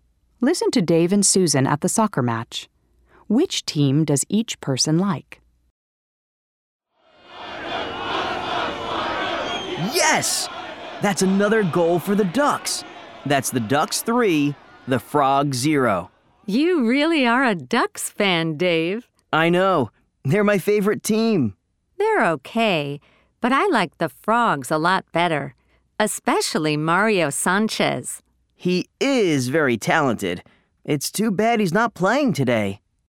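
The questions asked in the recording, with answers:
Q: Which team does each person like?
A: Dave likes the Ducks; Susan likes the Frogs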